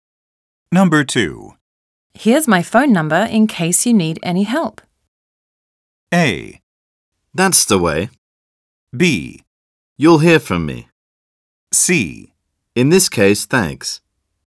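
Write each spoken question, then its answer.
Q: Here's my phone number in case you need any help.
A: B: You'll hear from me.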